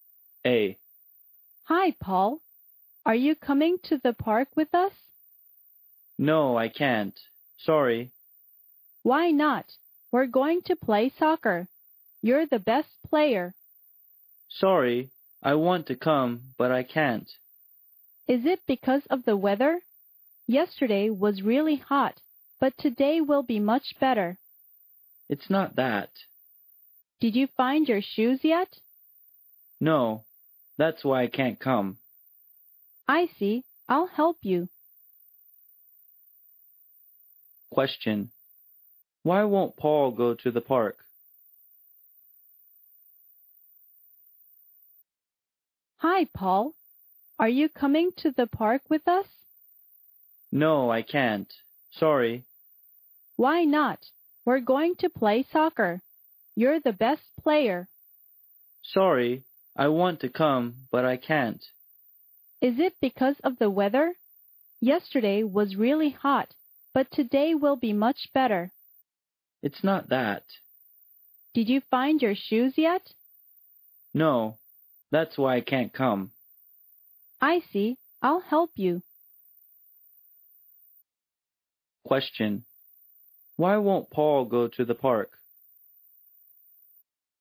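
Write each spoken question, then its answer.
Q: Why won't Paul go to the park?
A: Because he hasn't found his shoes.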